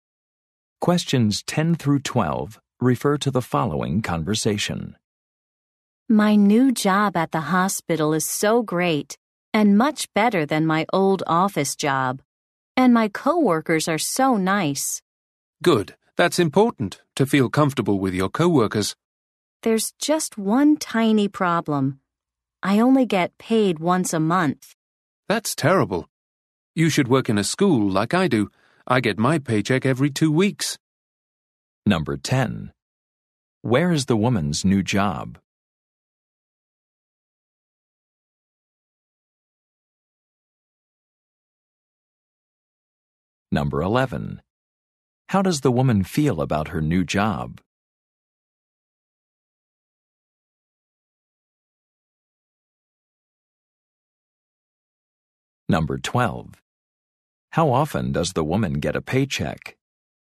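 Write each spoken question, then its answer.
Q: Where is the woman's new job?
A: At a hospital

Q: How does the woman feel about her new job?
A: She likes it a lot

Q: How often does the woman get a paycheck?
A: Once a month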